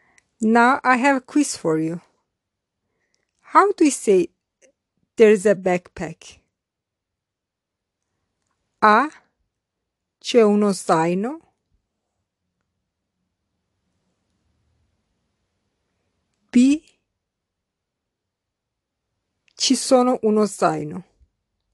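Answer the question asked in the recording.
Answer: A: C'è uno zaino.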